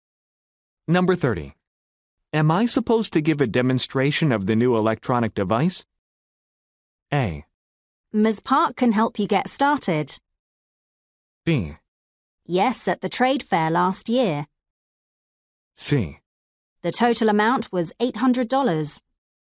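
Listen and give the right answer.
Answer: A: Ms. Park can help you get started.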